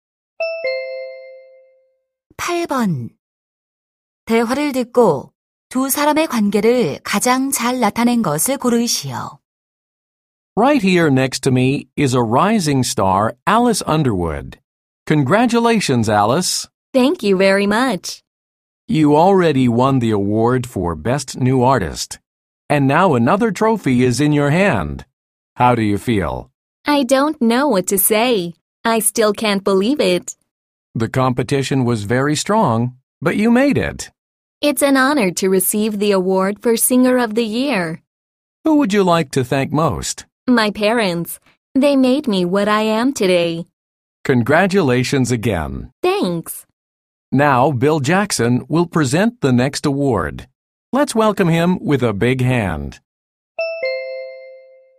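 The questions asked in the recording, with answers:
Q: 대화를 듣고 두 사람의 관계를 가장 잘 나타낸 것을 고르시오.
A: 시상식 진행자와 가수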